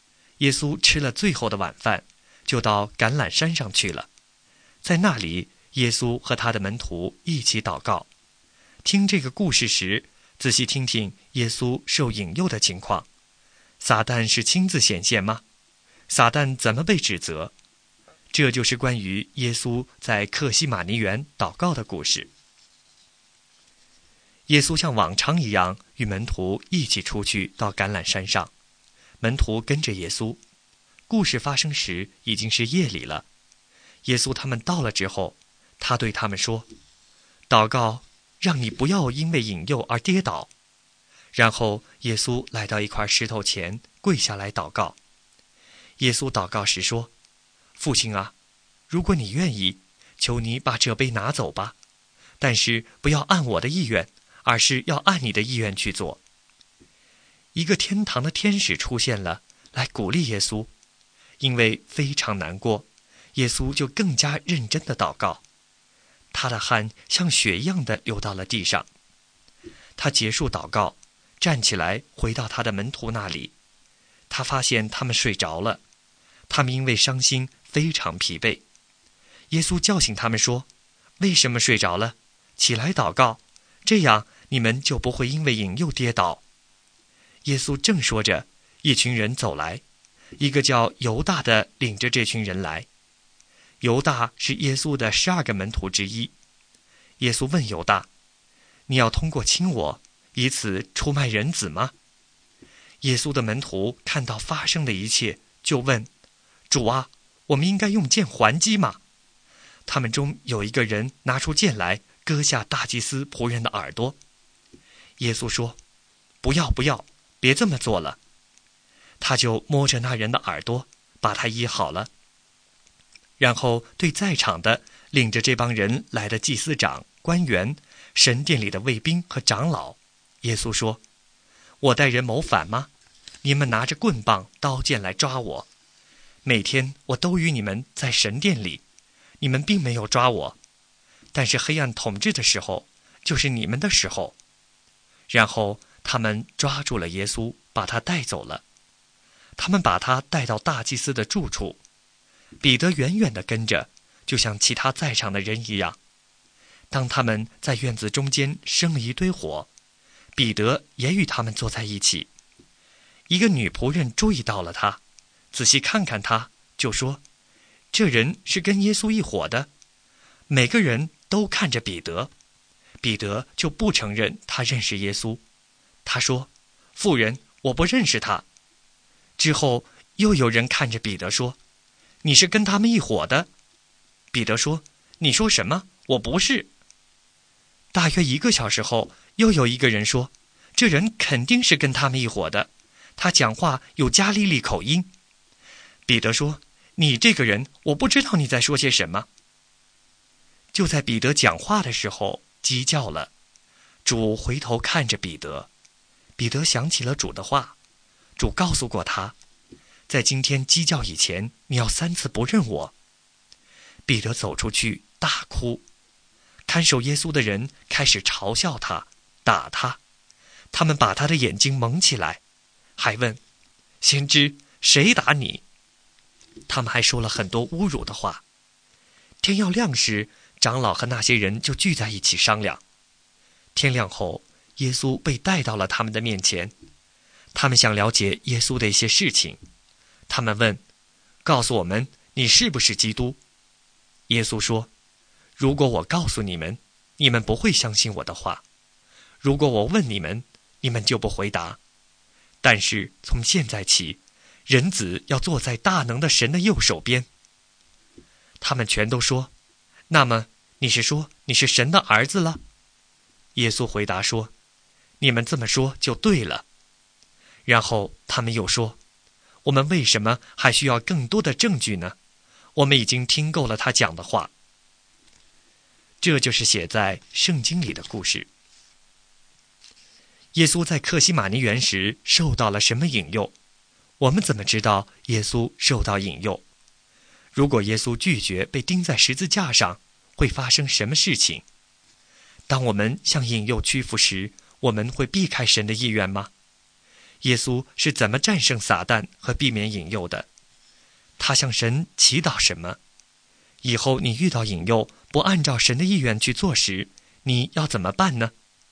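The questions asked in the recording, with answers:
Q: 他向神祈祷什么?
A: 求父把这杯拿走,但不要按他的意愿,而要按父的意愿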